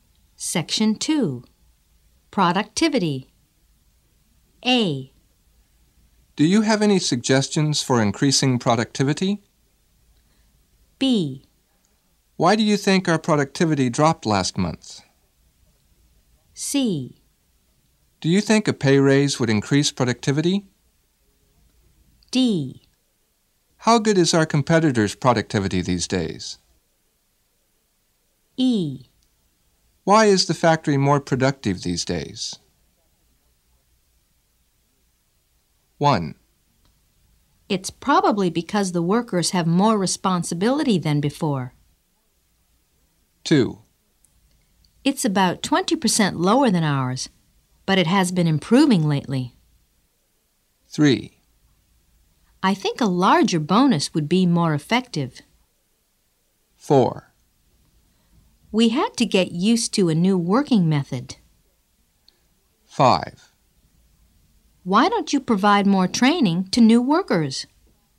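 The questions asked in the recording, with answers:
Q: It's probably because the workers have more responsibility than before.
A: E: Why is the factory more productive these days?

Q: It's about 20% lower than ours, but it has been improving lately.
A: D: How good is our competitor's productivity these days?

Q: I think a larger bonus would be more effective.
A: C: Do you think a pay raise would increase productivity?

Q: We had to get used to a new working method.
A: B: Why do you think our productivity dropped last month?

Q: Why don't you provide more training to new workers?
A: A: Do you have any suggestions for increasing productivity?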